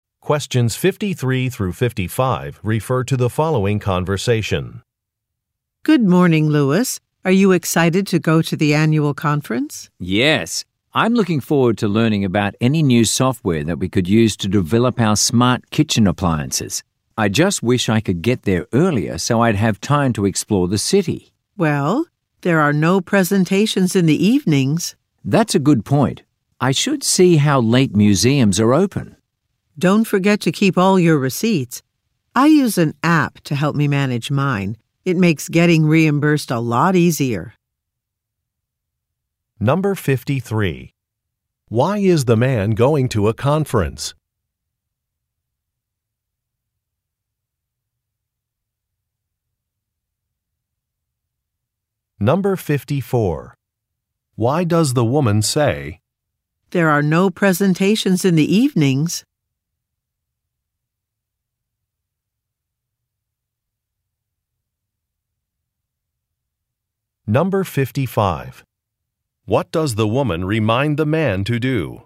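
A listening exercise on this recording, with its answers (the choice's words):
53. Why is the man going to a conference?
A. To promote his products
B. To earn a certification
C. To facilitate a workshop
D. To learn about new technology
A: To learn about new technology

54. Why does the woman say, "there are no presentations in the evenings"?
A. To decline an invitation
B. To express surprise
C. To make a suggestion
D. To complain about an event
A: To make a suggestion

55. What does the woman remind the man to do?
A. Keep some receipts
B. Confirm a reservation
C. Make a phone call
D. Check a map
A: Keep some receipts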